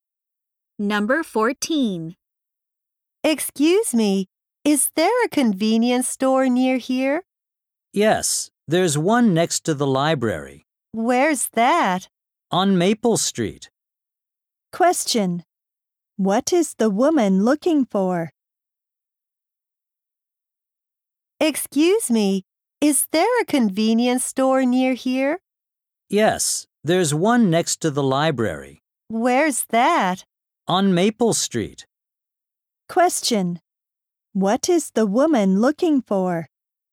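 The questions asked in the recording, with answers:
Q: What is the woman looking for?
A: A convenience store.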